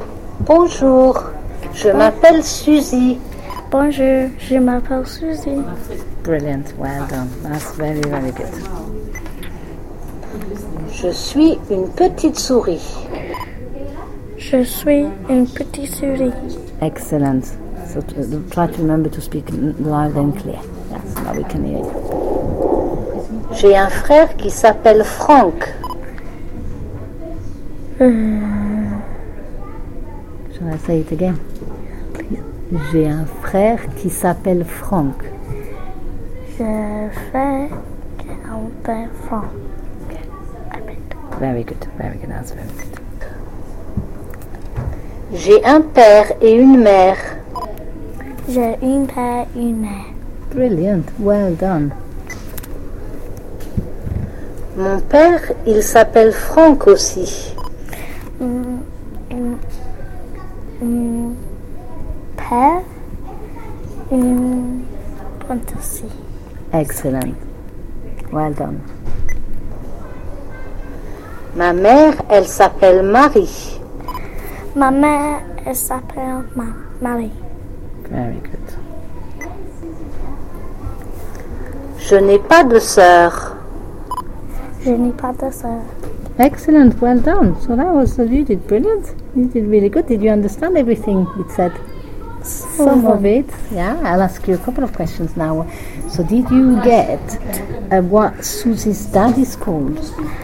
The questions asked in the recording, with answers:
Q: So did you get what Susie's dad is called?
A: It says, mon père, il s'appelle Franck aussi.